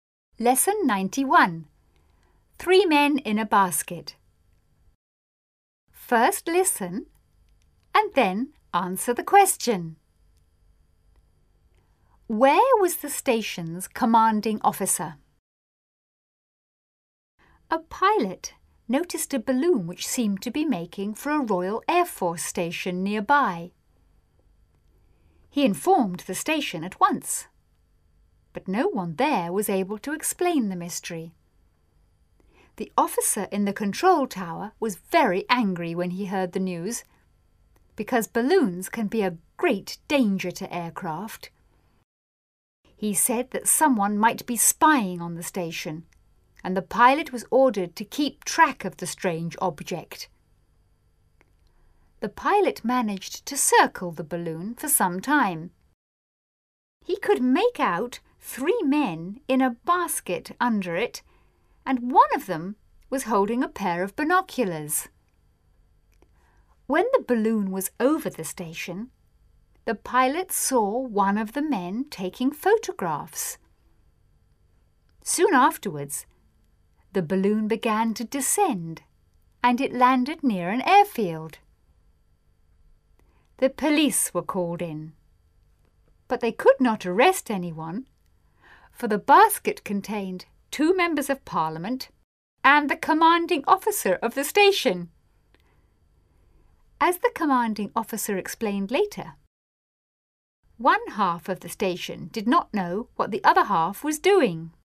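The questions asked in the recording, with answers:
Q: Where was the station's commanding officer?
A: In the balloon's basket, with two members of parliament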